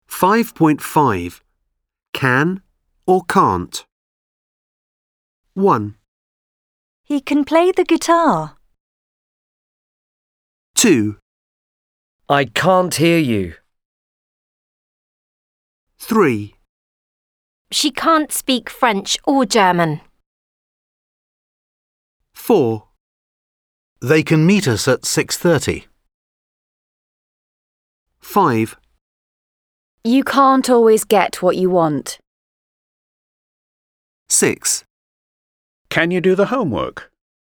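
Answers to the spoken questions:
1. can
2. can't
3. can't
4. can
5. can't
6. can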